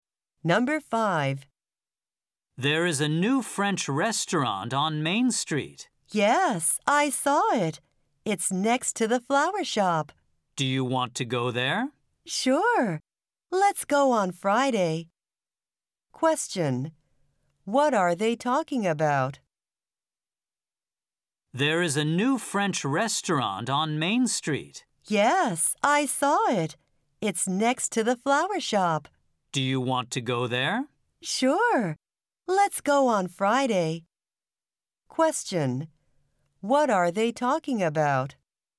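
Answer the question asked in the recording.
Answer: A new French restaurant on Main Street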